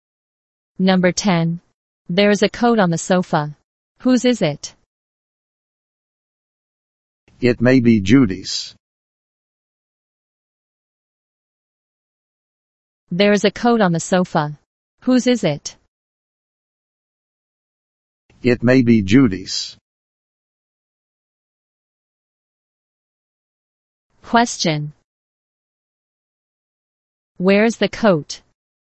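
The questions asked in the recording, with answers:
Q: Where is the coat?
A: On the sofa.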